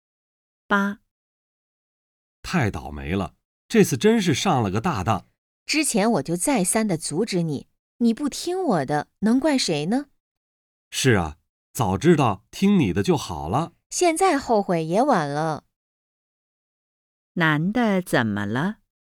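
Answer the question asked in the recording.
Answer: 上当了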